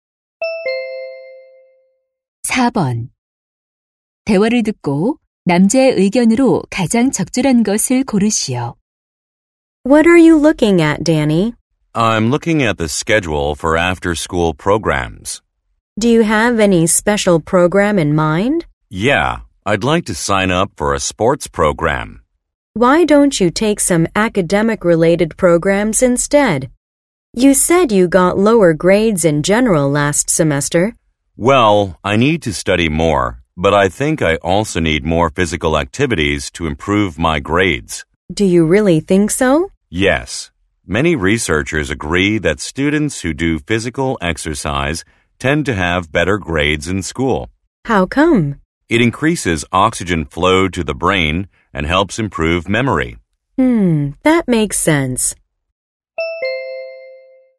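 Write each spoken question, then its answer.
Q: 대화를 듣고 남자의 의견으로 가장 적절한 것을 고르시오.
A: 신체 활동은 학업 성적 향상에 도움이 된다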